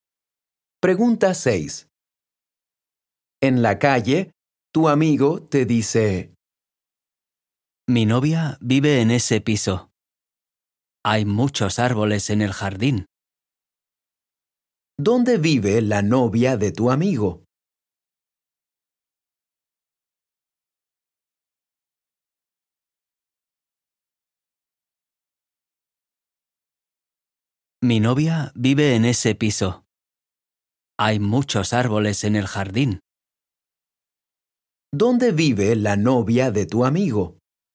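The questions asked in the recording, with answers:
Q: ¿Dónde vive la novia de tu amigo?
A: En un piso con muchos árboles en el jardín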